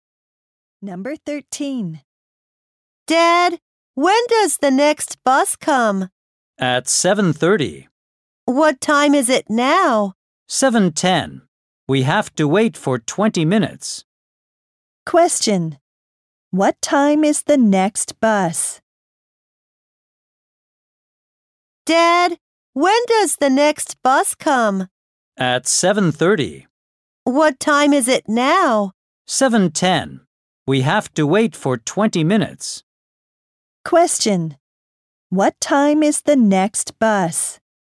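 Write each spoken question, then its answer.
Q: What time is the next bus?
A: At 7:30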